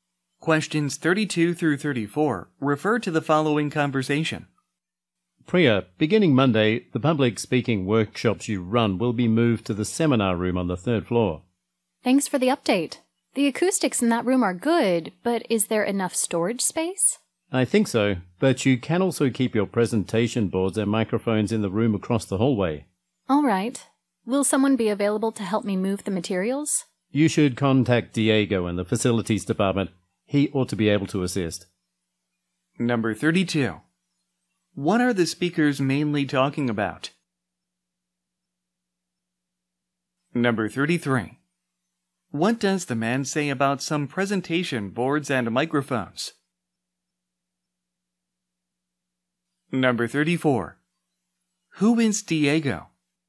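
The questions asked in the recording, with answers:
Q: What are the speakers mainly talking about?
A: A번 A change in workshop location.

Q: What does the man say about some presentation boards and microphones?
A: They can be kept in the room across the hallway

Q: Who is Diego?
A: A facilities department employee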